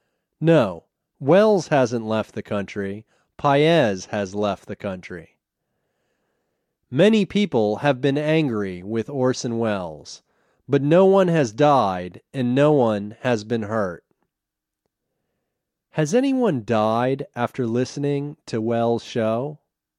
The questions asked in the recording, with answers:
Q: Has anyone died after listening to Welles' show?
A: No, no one has died and no one has been hurt.